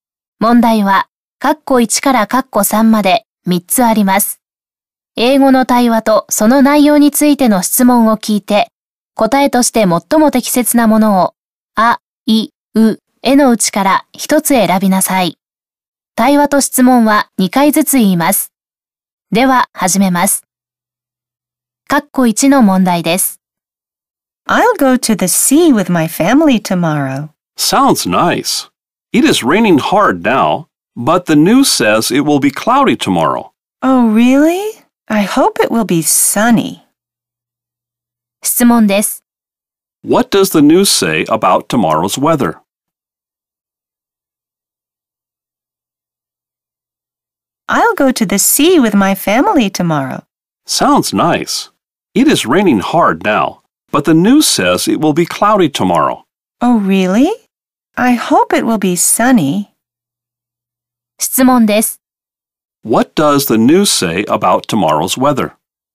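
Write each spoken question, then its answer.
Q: What does the news say about tomorrow's weather?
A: It will be cloudy.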